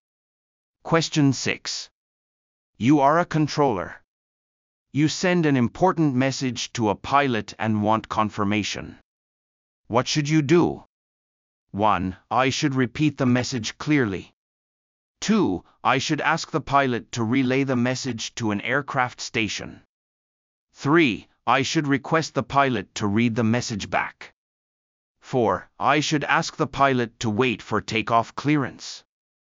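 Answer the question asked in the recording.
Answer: 3: I should request the pilot to read the message back.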